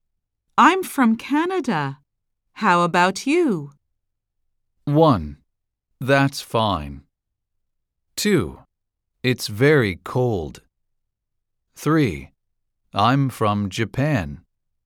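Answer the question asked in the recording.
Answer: 3: I'm from Japan.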